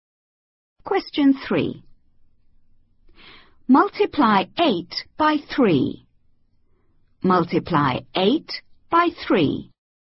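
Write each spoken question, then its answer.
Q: Multiply 8 by 3.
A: 24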